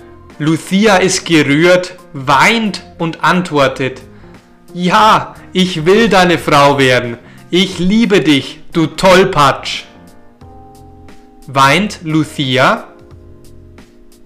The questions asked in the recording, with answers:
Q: Weint Lucia?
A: Ja, Lucia weint.